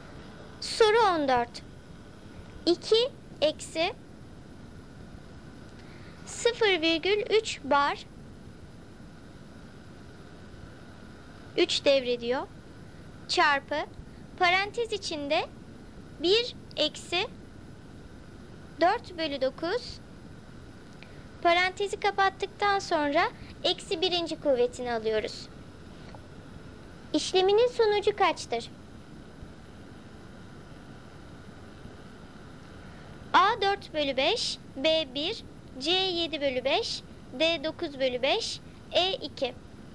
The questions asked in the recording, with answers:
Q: İşleminin sonucu kaçtır?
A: Doğru cevap C7/5.